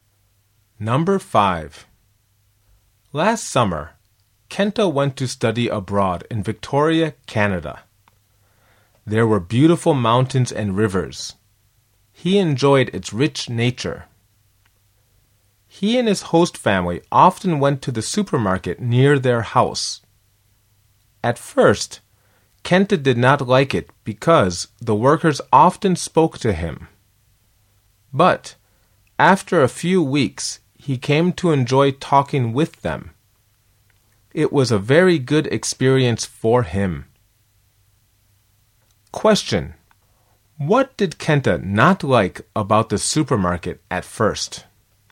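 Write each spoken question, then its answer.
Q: What did Kenta not like about the supermarket at first?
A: The workers often spoke to him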